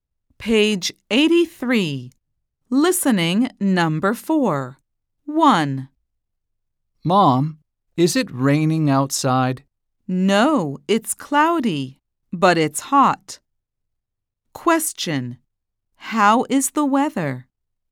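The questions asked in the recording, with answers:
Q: How is the weather?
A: cloudy and hot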